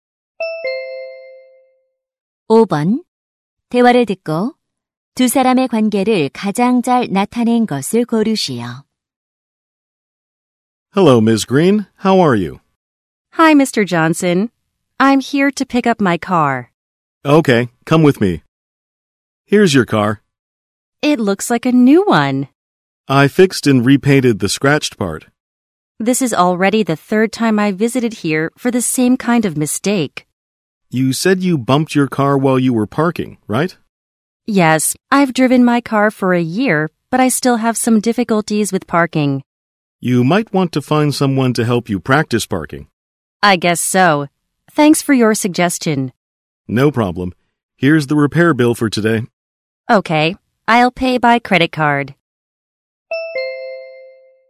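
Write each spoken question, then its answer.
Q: 대화를 듣고 두 사람의 관계를 가장 잘 나타낸 것을 고르시오.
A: 자동차 정비사 - 고객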